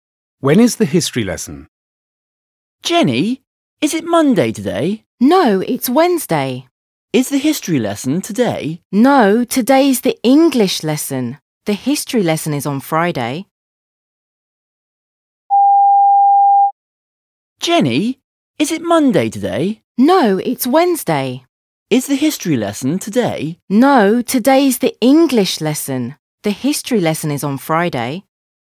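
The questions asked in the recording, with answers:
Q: When is the history lesson?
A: On Friday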